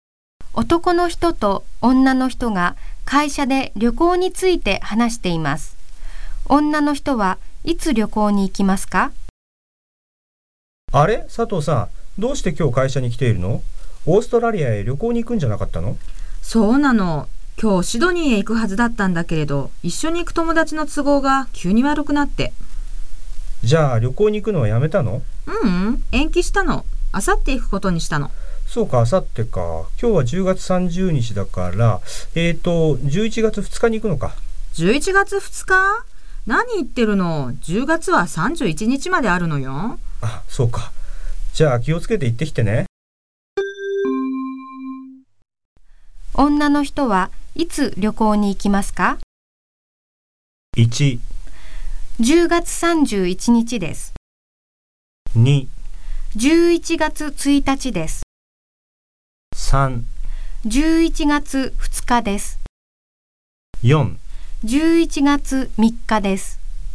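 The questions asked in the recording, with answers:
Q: 女の人はいつ旅行に行きますか?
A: 2: 11月1日です。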